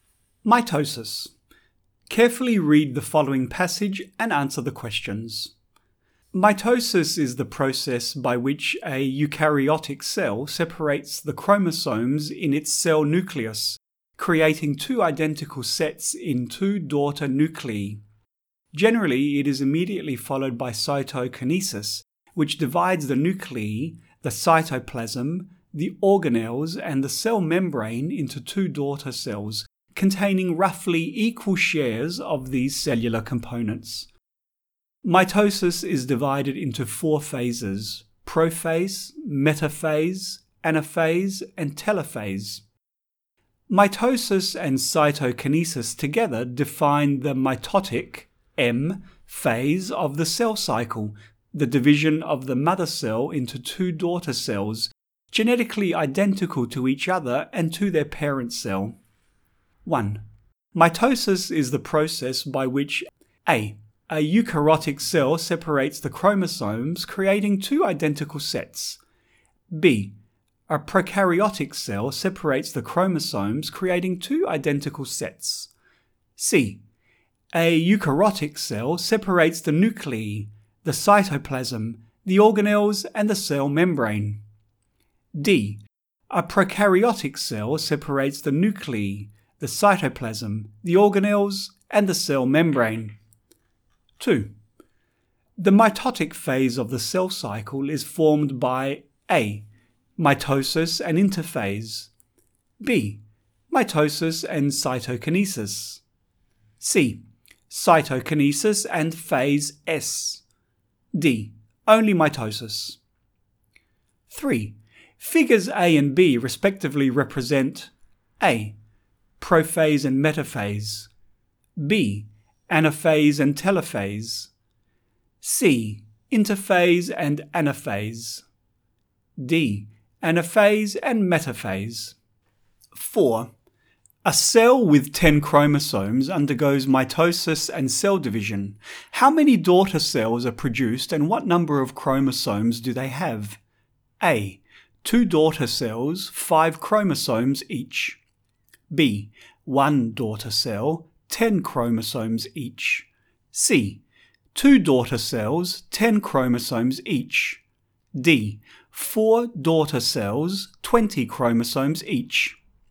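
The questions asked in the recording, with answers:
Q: The mitotic phase of the cell cycle is formed by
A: B: Mitosis and cytokinesis

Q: A cell with 10 chromosomes undergoes mitosis and cell division. How many daughter cells are produced and what number of chromosomes do they have?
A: C: 2 daughter cells, 10 chromosomes each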